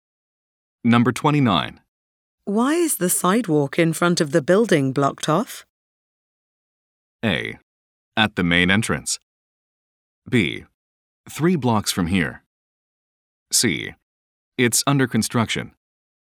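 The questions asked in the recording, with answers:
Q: Why is the sidewalk in front of the building blocked off?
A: C: It's under construction.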